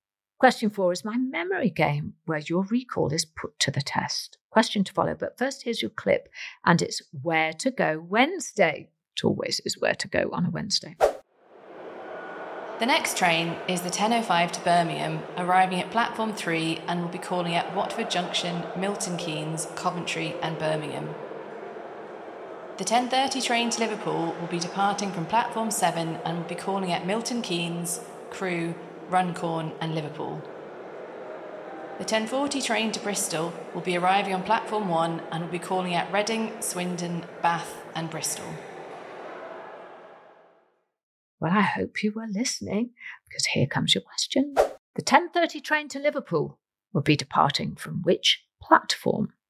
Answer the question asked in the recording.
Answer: you get a point if you said platform 7 because that's the correct answer.